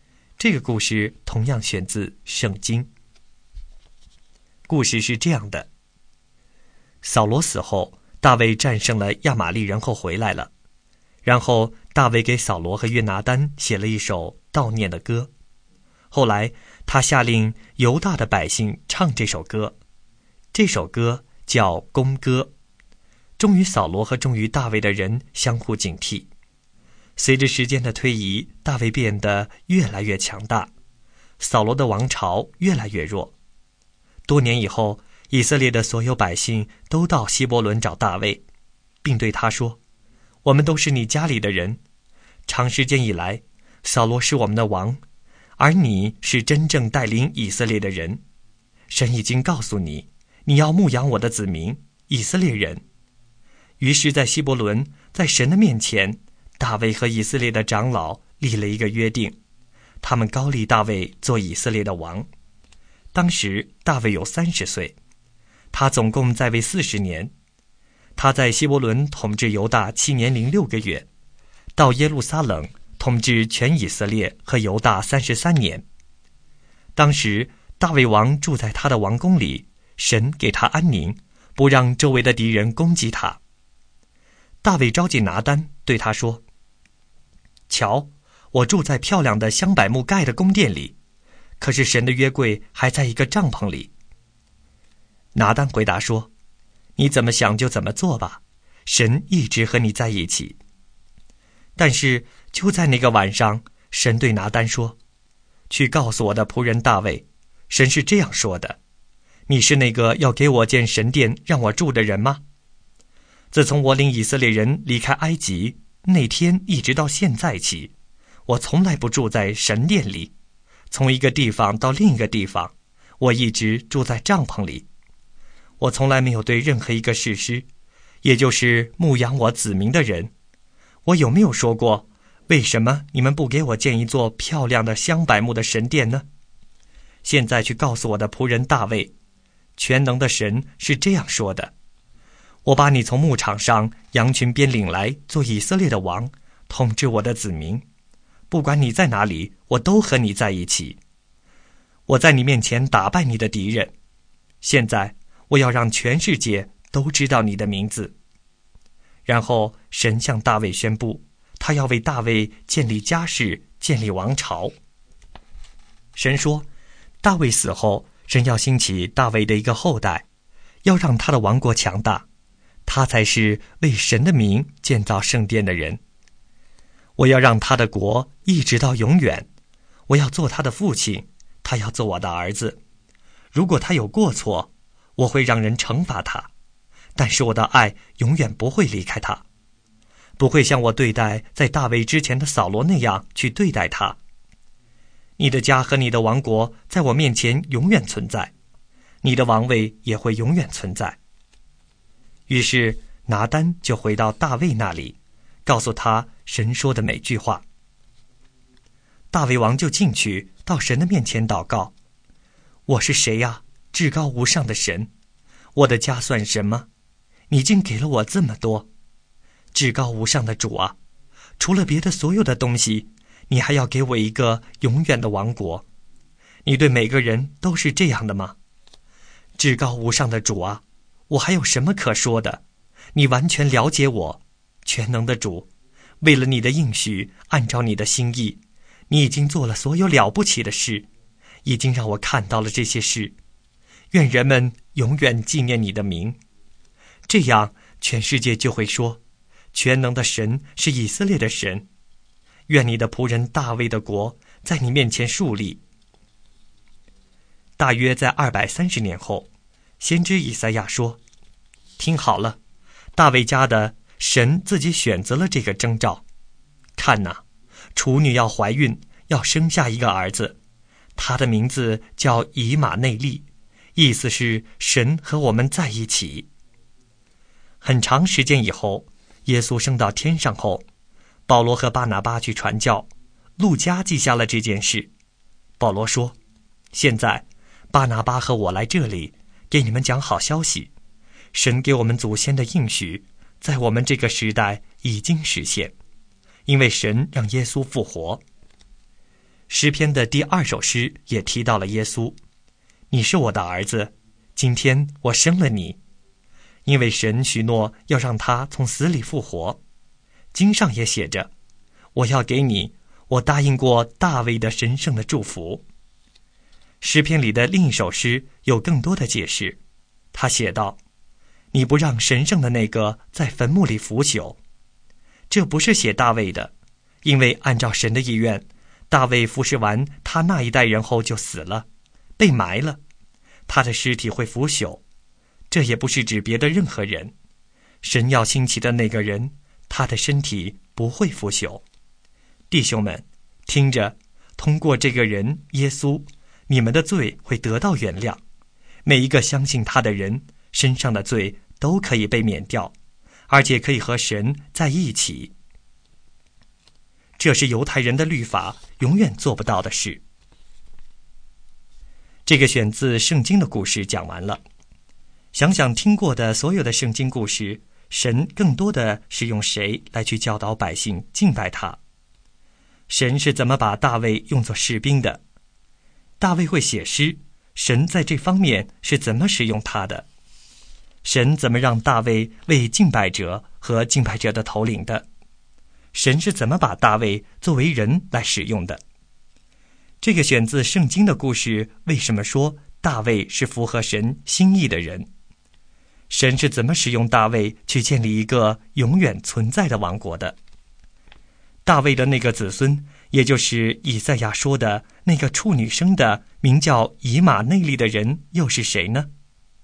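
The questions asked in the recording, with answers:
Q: 大卫的那个子孙,也就是以赛亚说的那个处女生的名叫以马内利的人又是谁呢?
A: 耶稣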